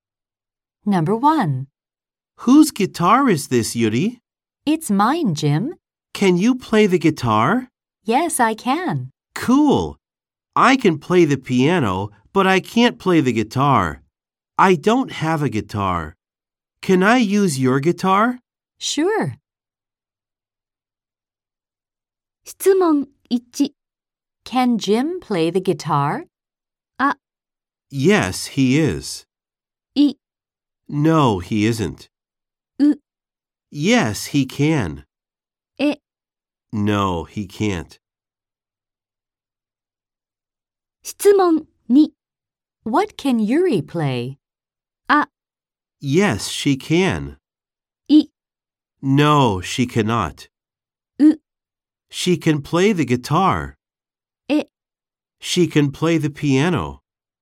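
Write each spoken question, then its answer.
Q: Can Jim play the guitar?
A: エ: No, he can't.

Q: What can Yuri play?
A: ウ: She can play the guitar.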